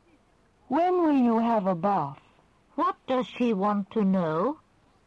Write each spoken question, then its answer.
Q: What does she want to know?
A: She wants to know when you will have a bath.